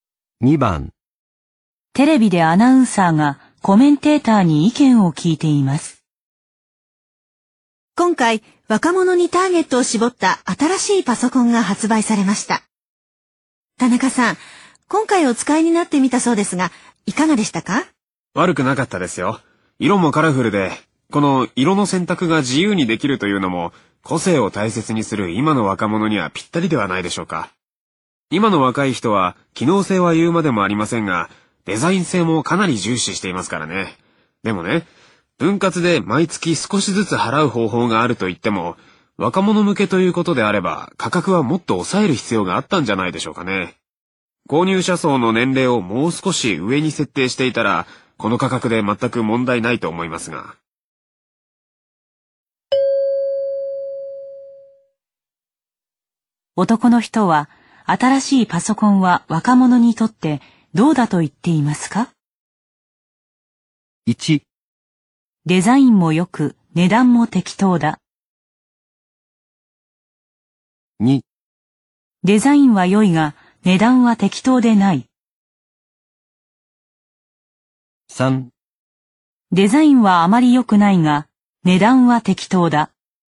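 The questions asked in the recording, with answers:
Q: 男の人は、新しいパソコンは若者にとってどうだと言っていますか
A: 2: デザインは良いが値段は適当でない。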